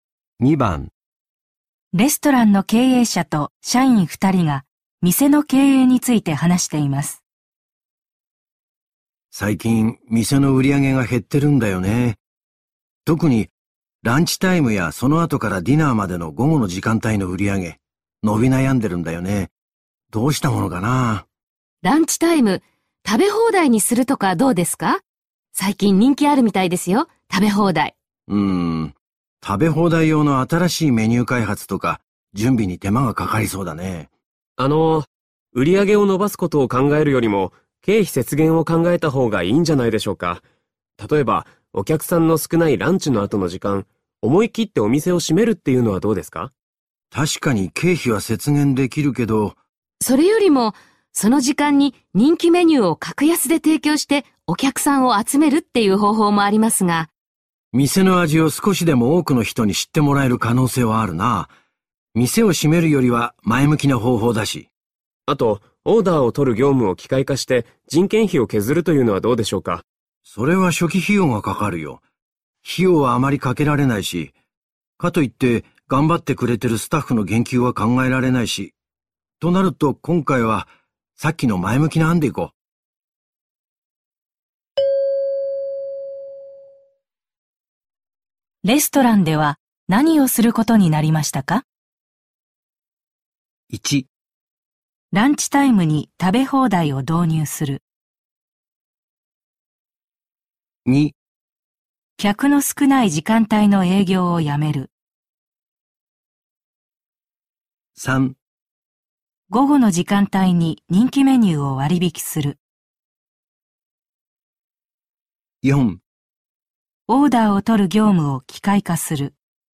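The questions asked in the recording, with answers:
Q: レストランでは何をすることになりましたか?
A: 3: 午後の時間帯に人気メニューを割引する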